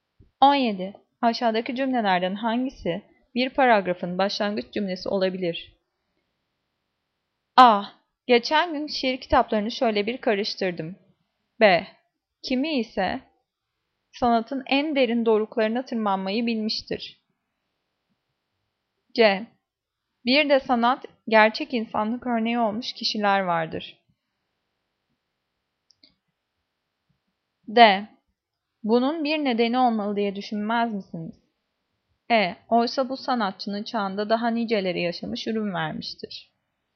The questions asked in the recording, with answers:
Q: Aşağıdaki cümlelerden hangisi bir paragrafın başlangıç cümlesi olabilir?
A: Cevap A. Geçen gün şiir kitaplarını şöyle bir karıştırdım.